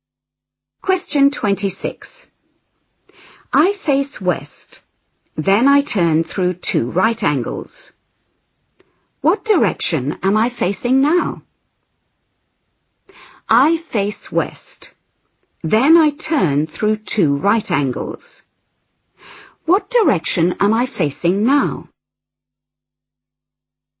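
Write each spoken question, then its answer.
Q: What direction am I facing now?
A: East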